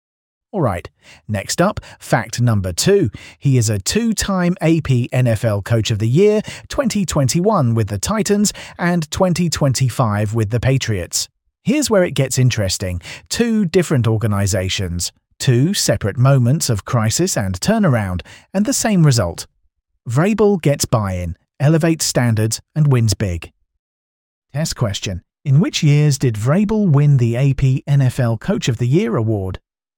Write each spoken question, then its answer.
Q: In which years did Vrabel win the AP NFL Coach of the Year award?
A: Correct answer, 2021 and 2025.